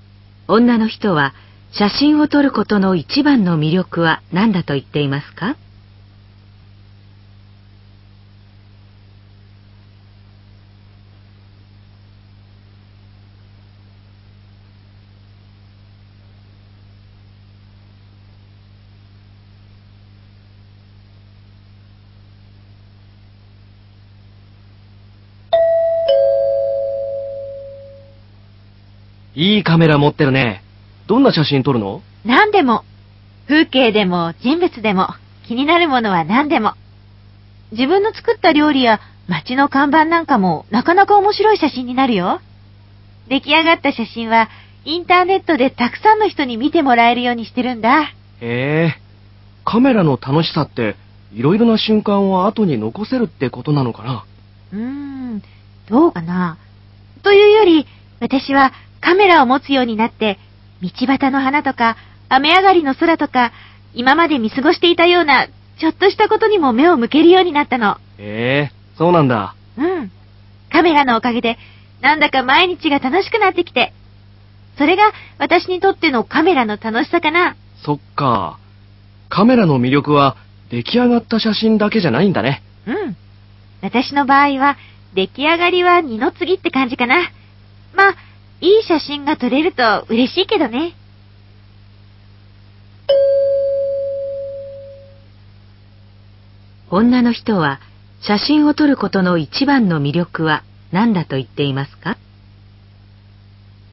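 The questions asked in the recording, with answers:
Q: 女の人は、写真を撮ることの一番の魅力は何だと言っていますか?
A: 今まで見過ごしていたちょっとしたことに目を向けるようになり、毎日が楽しくなること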